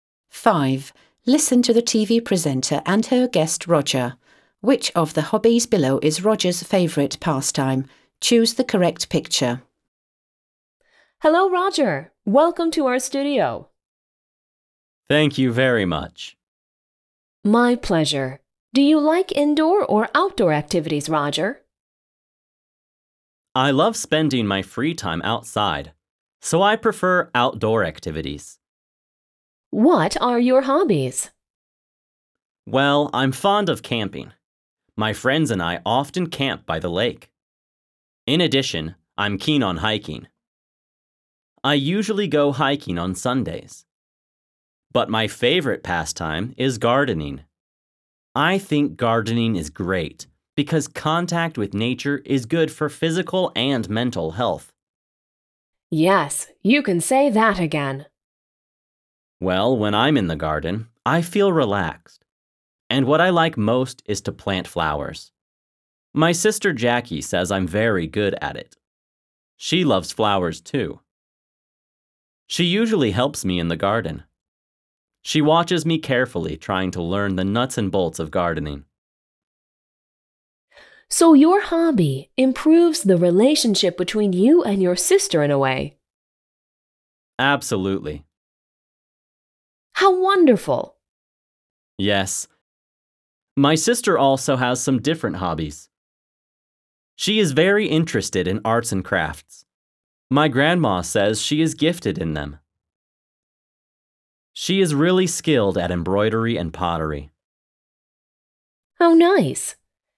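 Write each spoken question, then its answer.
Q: Which of the hobbies below is Roger's favourite pastime?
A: gardening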